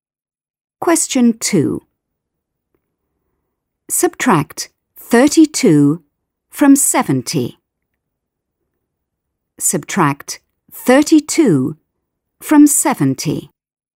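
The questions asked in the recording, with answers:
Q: Subtract 32 from 70.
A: 38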